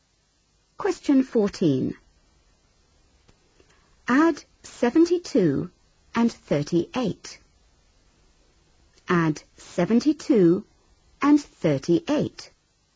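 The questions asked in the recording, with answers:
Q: Add 72 and 38.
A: 110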